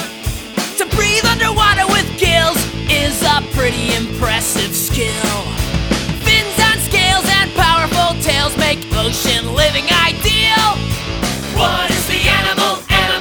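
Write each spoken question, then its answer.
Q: What is the animal?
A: Fish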